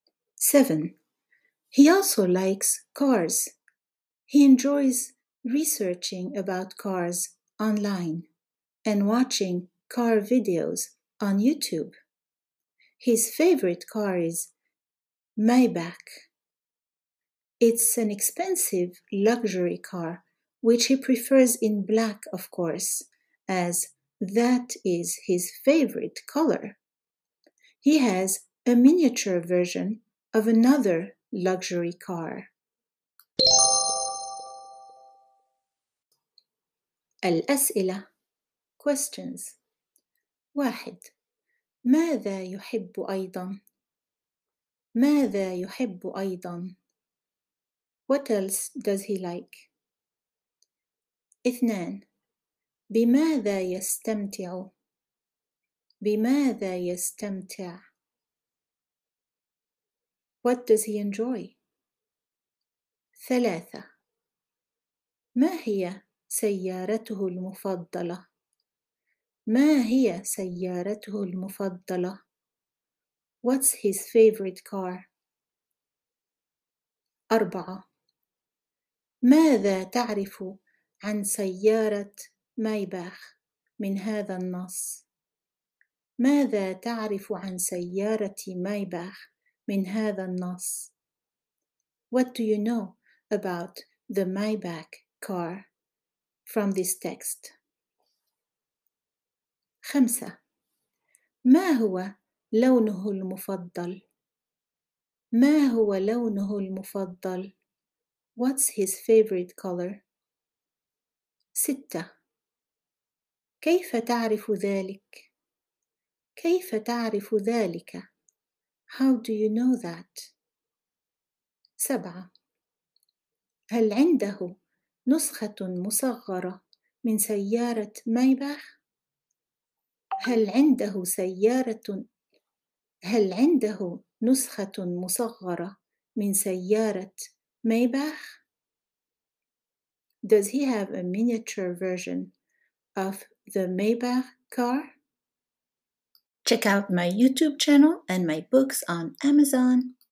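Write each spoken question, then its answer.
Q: ماذا يحب أيضا؟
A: السيارات

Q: بماذا يستمتع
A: بالبحث عن السيارات على الإنترنت ومشاهدة فيديوهات السيارات على يوتيوب

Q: ما هي سيارته المفضلة؟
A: مايباخ

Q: ماذا تعرف عن سيارة مايباخ من هذا النص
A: إنها سيارة فاخرة غالية

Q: ما هو لونه المفضل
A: الأسود

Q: كيف تعرف ذلك؟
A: لأنه يفضل سيارة مايباخ باللون الأسود لأنه لونه المفضل

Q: هل عنده نسخة مصغرة من سيارة مايباخ؟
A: لا، عنده نسخة مصغرة من سيارة فاخرة أخرى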